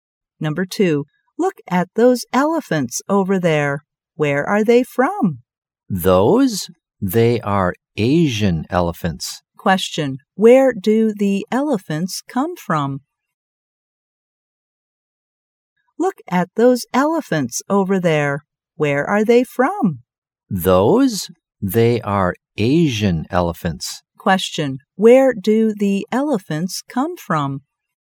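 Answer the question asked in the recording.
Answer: Asia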